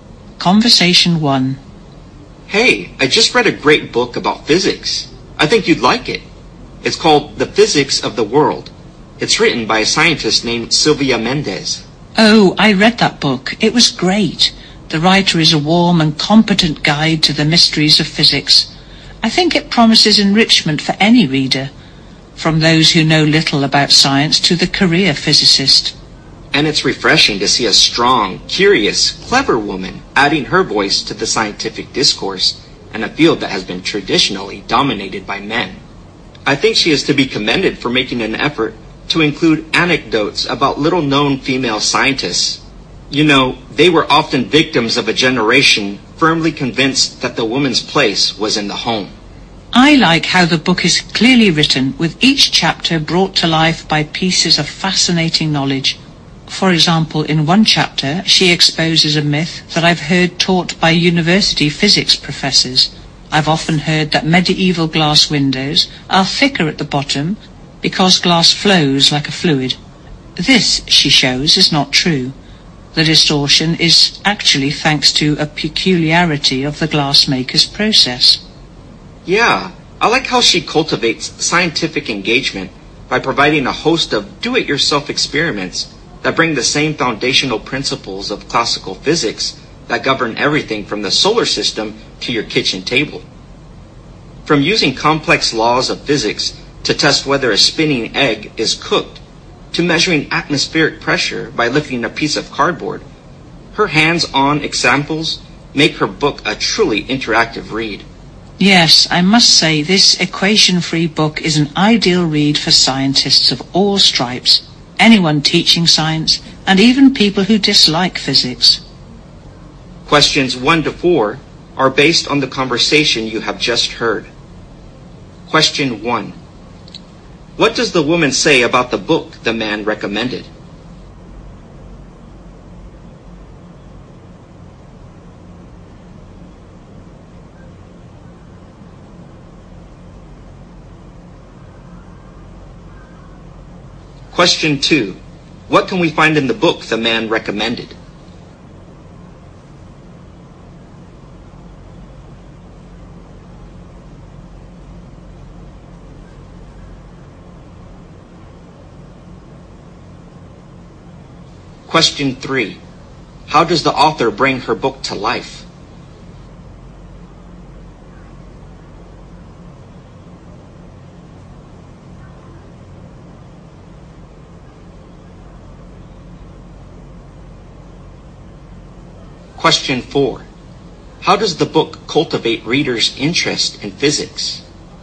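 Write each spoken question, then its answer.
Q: How does the author bring her book to life?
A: With pieces of fascinating knowledge in each chapter

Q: How does the book cultivate readers' interest in physics?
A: By providing do-it-yourself experiments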